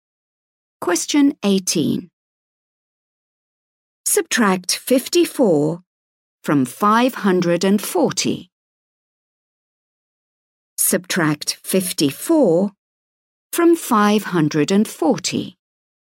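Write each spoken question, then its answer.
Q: Subtract 54 from 540.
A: 486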